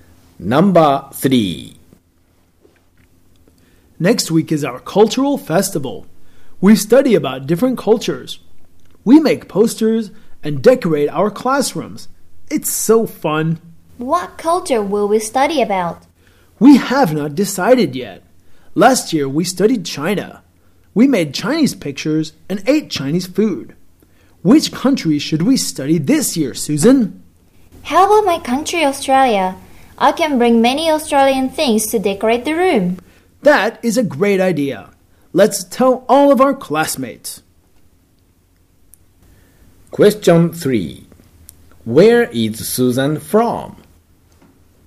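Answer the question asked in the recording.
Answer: Australia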